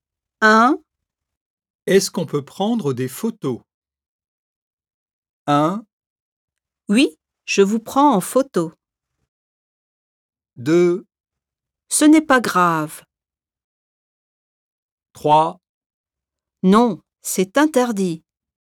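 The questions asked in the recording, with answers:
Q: Est-ce qu'on peut prendre des photos?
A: 3: Non, c'est interdit.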